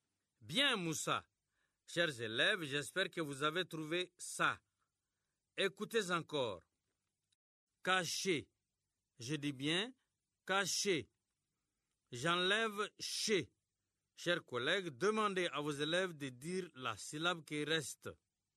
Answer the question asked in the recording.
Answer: Il reste cas.